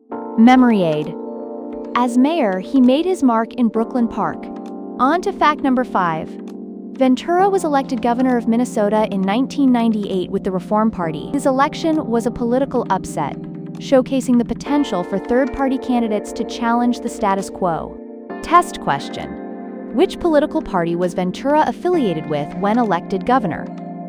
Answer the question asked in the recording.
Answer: Reform Party.